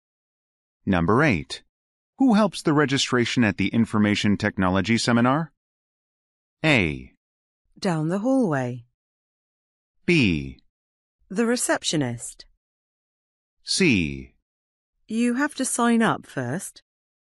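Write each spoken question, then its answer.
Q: Who helps the registration at the Information Technology Seminar?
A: B: The receptionist.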